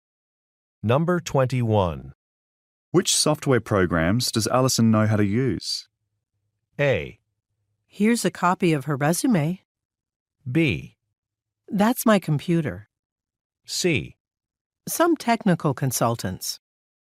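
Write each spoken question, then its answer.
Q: Which software programs does Allison know how to use?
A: A: Here's a copy of her resume.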